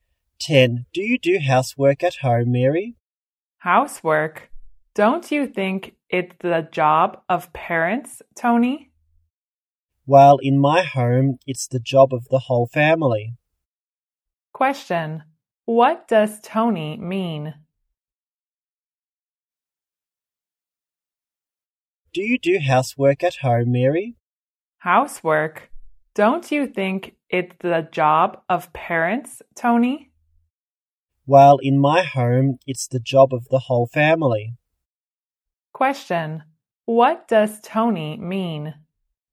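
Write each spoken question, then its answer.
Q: What does Tony mean?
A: Housework is the job of the whole family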